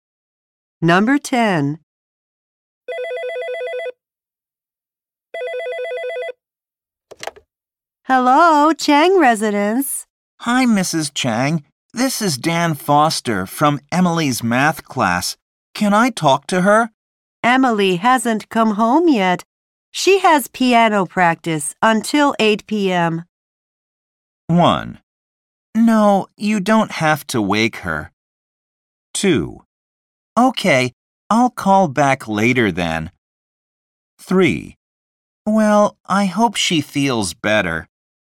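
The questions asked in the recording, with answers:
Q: She has piano practice until 8 p.m.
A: 2: Okay, I'll call back later then.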